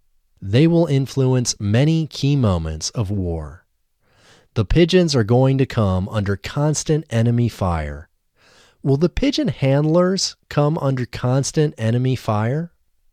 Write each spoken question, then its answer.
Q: Will the pigeon handlers come under constant enemy fire?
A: No, the pigeon handlers won't come under constant enemy fire.